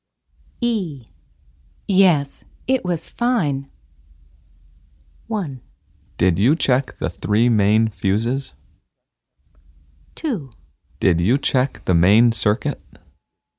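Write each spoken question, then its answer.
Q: Yes, it was fine.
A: 2: Did you check the main circuit?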